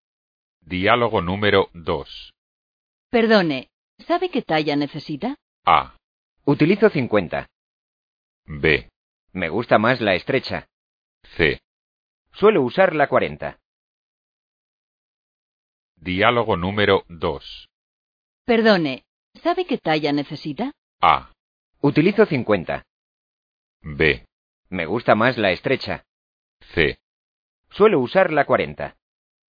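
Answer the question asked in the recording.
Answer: C: Suelo usar la 40.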